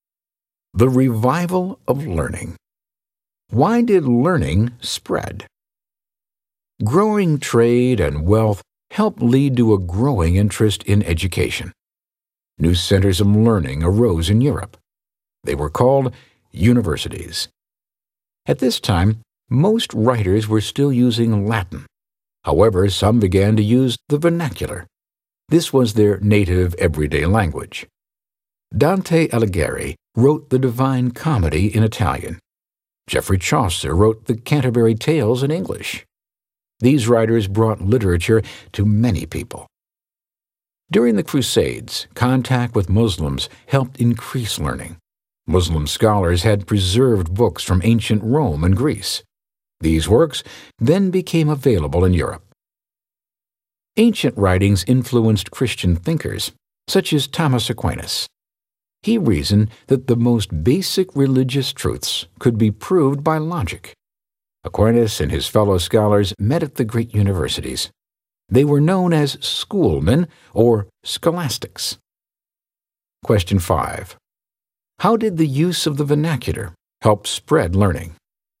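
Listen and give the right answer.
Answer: Writing in everyday native languages brought literature to many people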